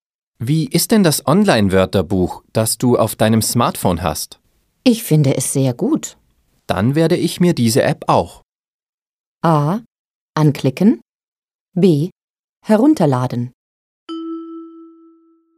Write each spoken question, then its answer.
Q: Dann werde ich mir diese App auch.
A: B. Dann werde ich mir diese App auch herunterladen.